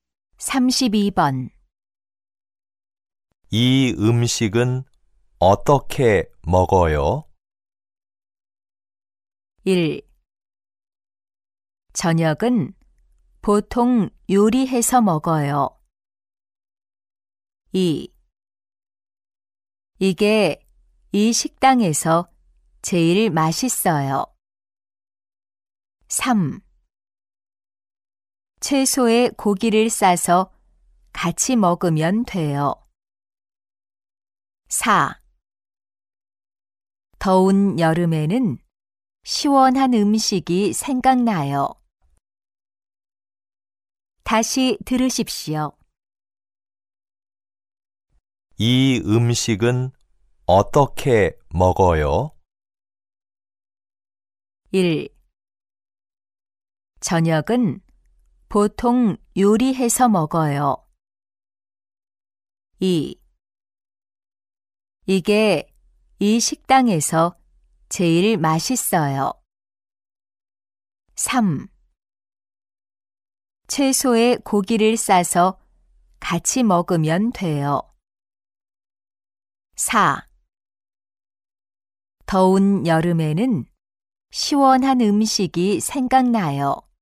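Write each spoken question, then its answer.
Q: 이 음식은 어떻게 먹어요?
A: 3: 채소에 고기를 싸서 같이 먹으면 돼요.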